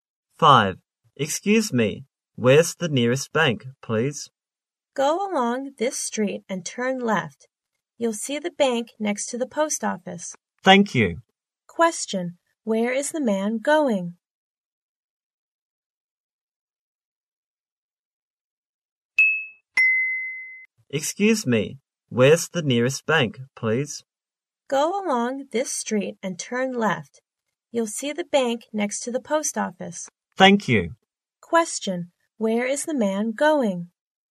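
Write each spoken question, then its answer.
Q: Where is the man going?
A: To the bank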